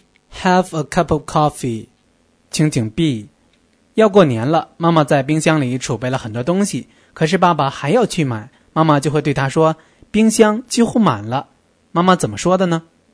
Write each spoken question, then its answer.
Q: 妈妈怎么说的呢?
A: The refrigerator is nearly full.